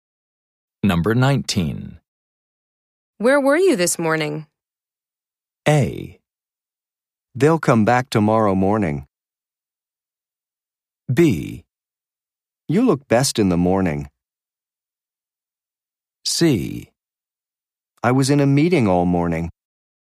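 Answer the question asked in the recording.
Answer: C: I was in a meeting all morning.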